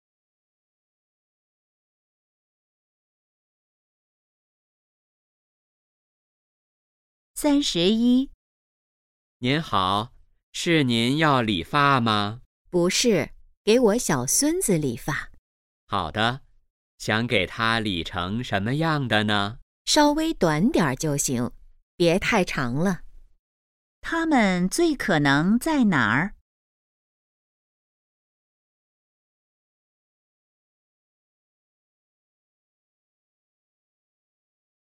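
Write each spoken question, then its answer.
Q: 它们最可能在哪儿?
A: 理发店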